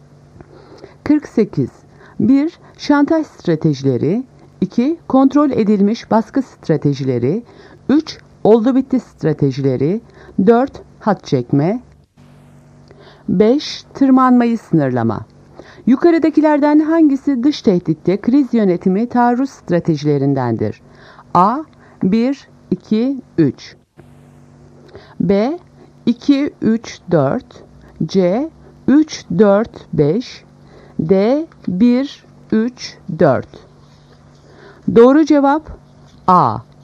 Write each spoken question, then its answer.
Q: Yukarıdakilerden hangisi dış tehditte kriz yönetimi taarruz stratejilerindendir?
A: Doğru cevap A. 1, 2, 3.